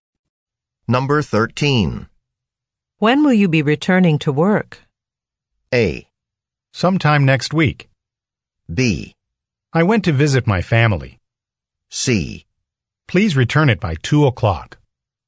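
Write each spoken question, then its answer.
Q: When will you be returning to work?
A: A: Sometime next week.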